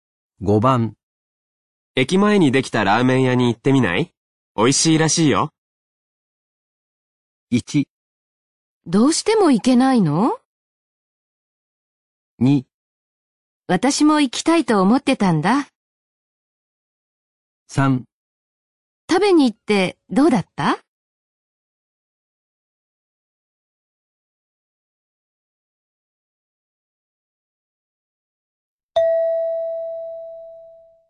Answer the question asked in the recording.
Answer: 2

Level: N3 Listening · Test 9